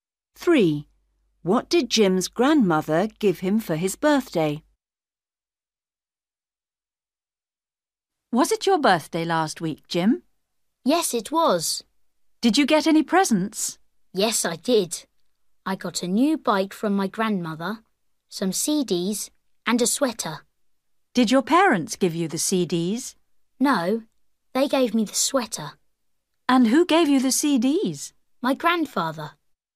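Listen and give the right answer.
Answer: a new bike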